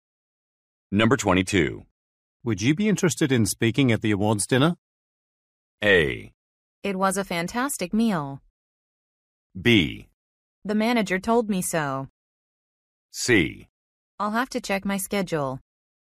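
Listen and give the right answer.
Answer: C: I'll have to check my schedule.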